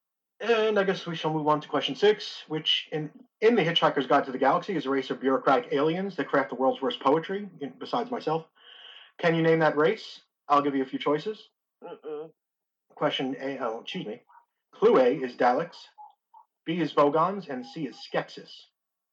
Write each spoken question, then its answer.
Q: Can you name that race?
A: It is Vogons.